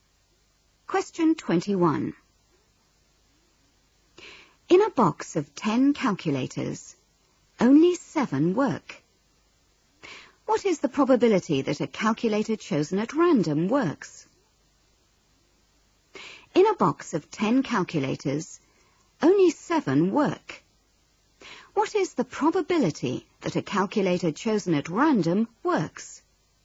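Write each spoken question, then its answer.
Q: What is the probability that a calculator chosen at random works?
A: 7/10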